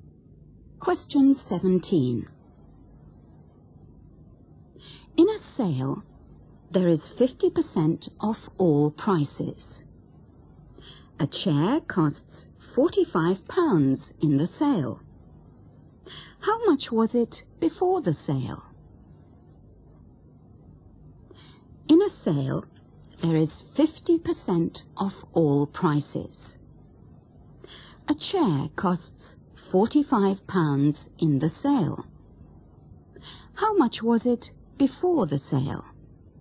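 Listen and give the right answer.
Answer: £90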